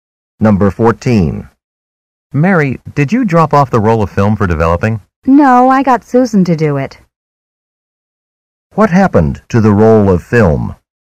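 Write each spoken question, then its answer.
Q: What happened to the roll of film?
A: Susan dropped it off for developing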